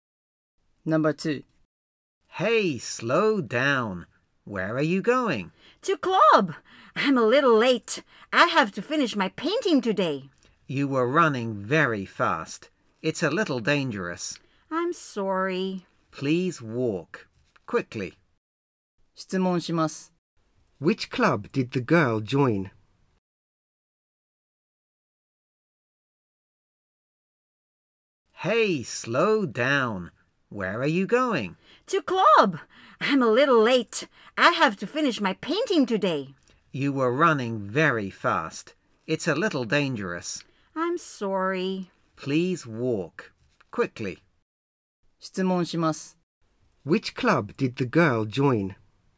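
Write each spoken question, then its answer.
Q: Which club did the girl join?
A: The art club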